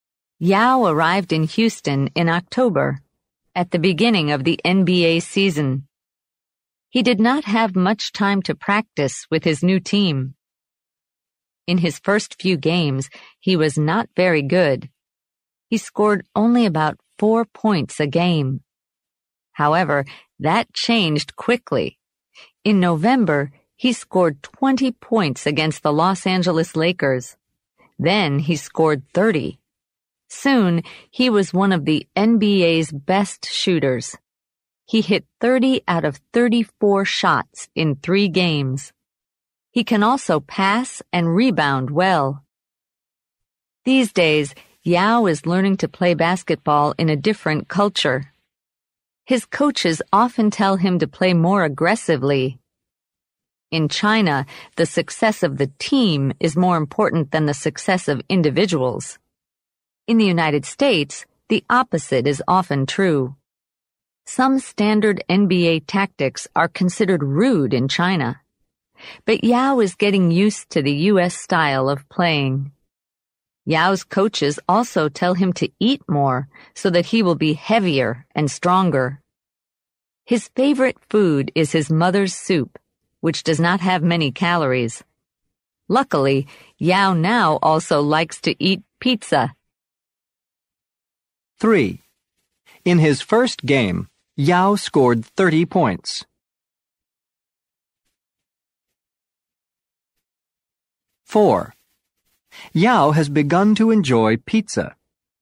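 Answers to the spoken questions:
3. False
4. True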